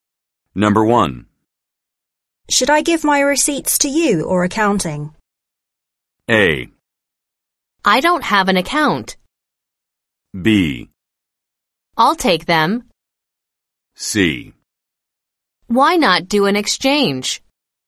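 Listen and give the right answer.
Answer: B: I'll take them.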